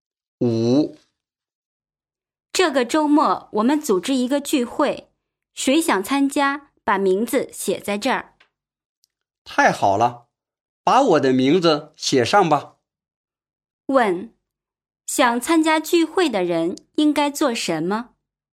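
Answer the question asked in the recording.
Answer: 把名字写在这儿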